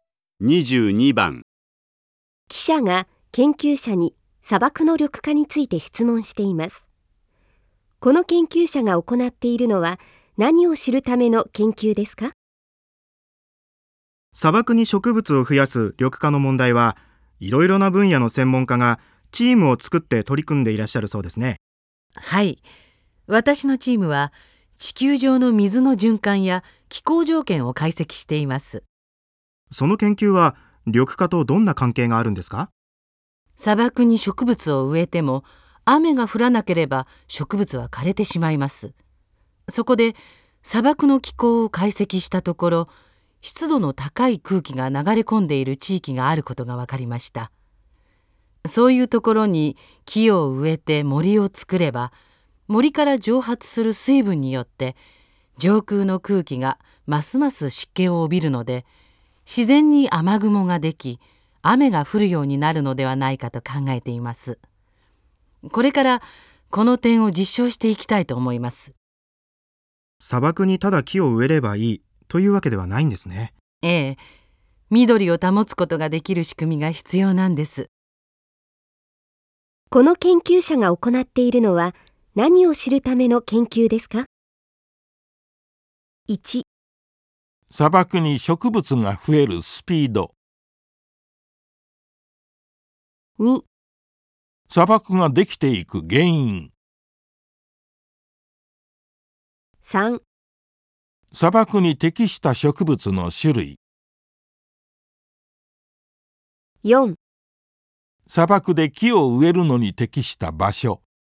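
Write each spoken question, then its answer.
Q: この研究者が行っているのは何を知るための研究ですか?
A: 4: 砂漠で木を植えるのに適した場所。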